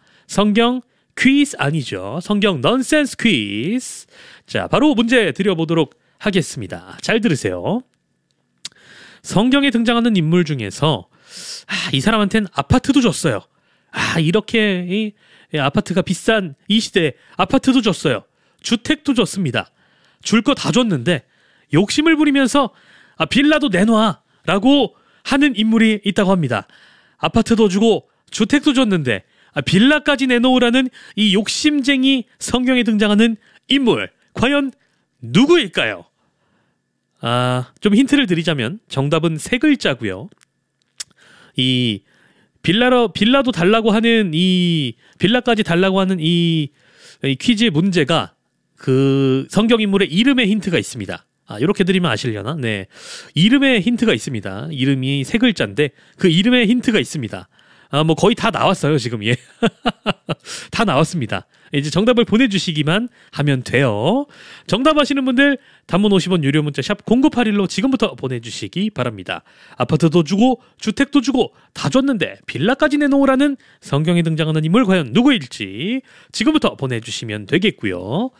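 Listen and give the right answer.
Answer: 빌라도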